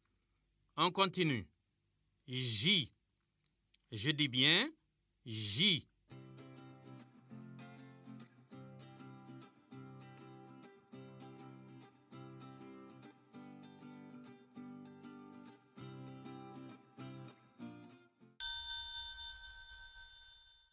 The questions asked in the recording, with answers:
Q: On continue. J. Je dis bien J.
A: Monsieur, la lettre qui vient avant J, c'est I.